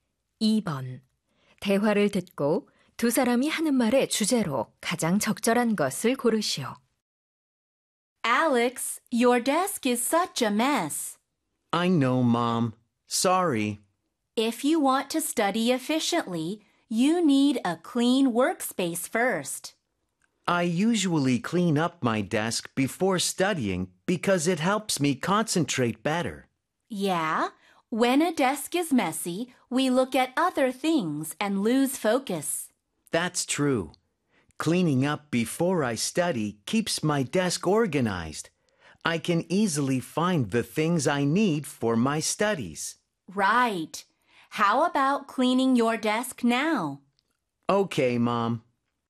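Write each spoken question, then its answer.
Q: 대화를 듣고 두 사람이 하는 말의 주제로 가장 적절한 것을 고르시오.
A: 공부 전 책상 정리의 중요성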